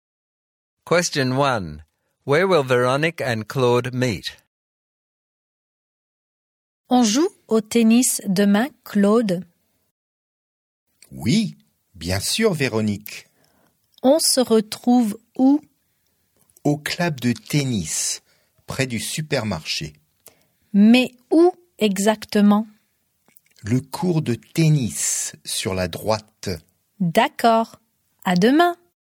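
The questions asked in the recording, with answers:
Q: Where will Veronique and Claude meet?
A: At the tennis club near the supermarket, at the court on the right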